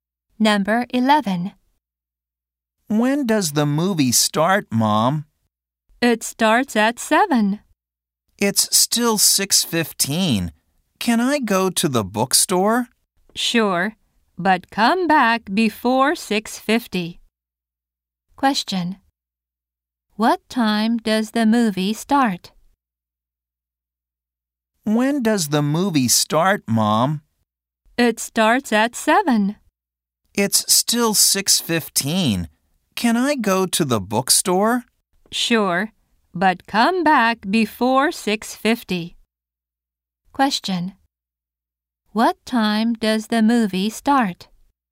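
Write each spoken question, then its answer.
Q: Question. What time does the movie start?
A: At 7.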